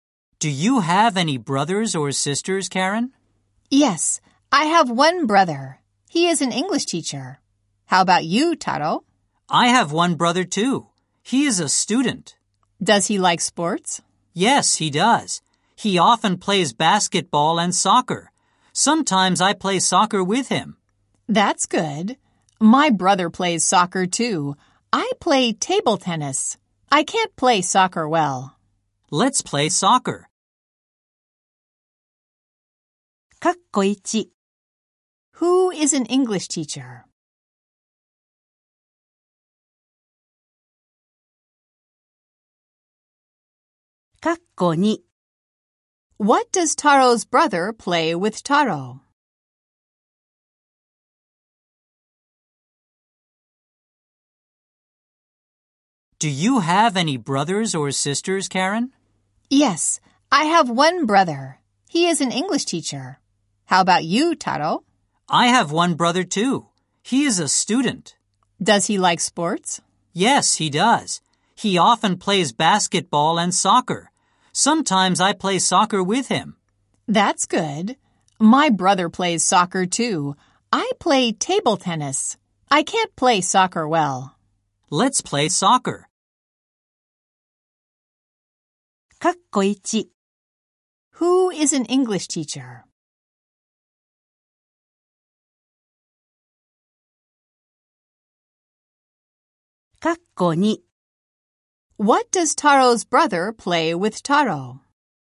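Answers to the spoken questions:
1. Karen's brother
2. Soccer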